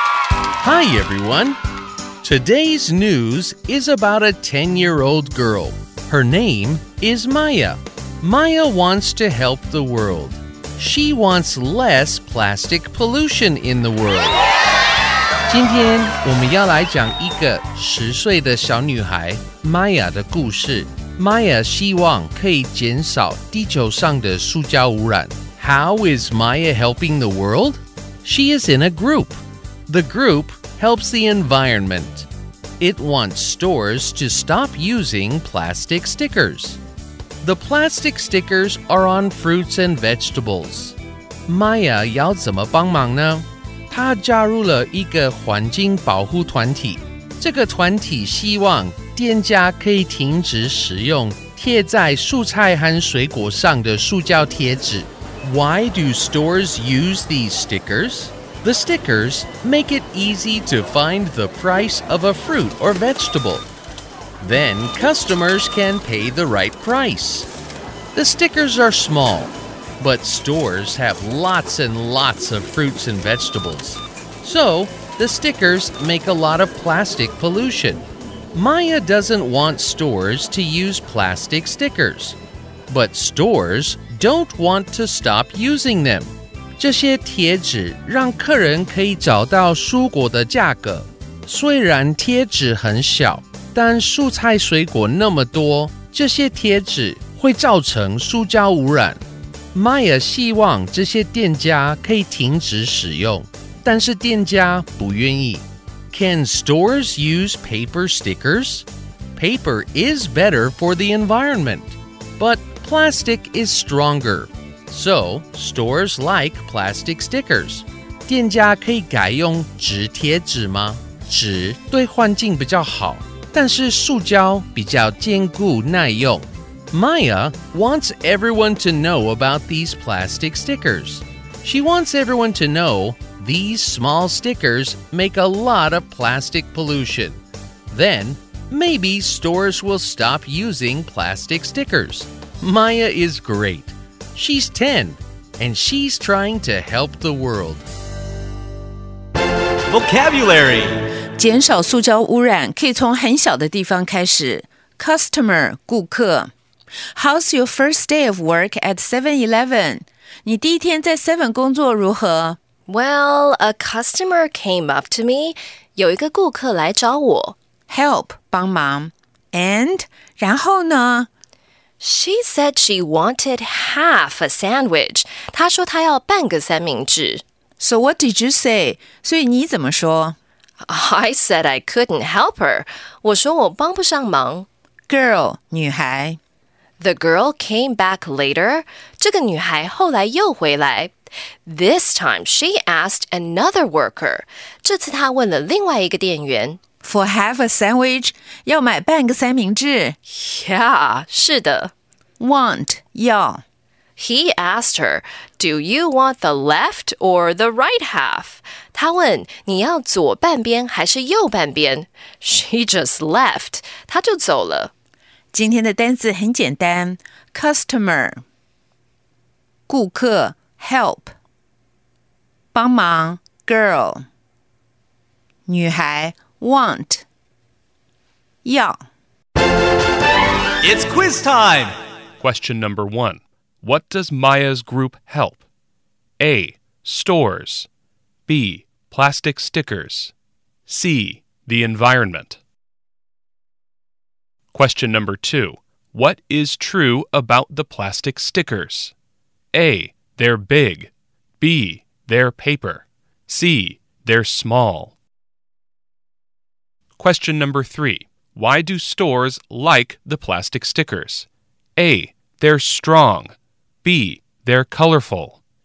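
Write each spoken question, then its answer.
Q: What does Maya's group help?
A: C: The environment.

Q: What is true about the plastic stickers?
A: C: They're small.

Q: Why do stores like the plastic stickers?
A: A: They're strong.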